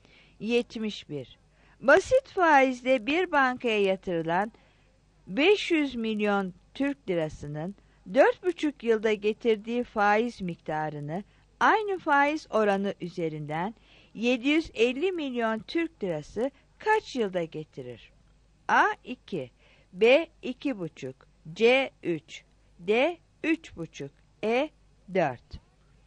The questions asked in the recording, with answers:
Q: Basit faizle bir bankaya yatırılan 500 milyon Türk lirasının 4,5 yılda getirdiği faiz miktarını aynı faiz oranı üzerinden 750 milyon Türk lirası kaç yılda getirir?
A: 71 C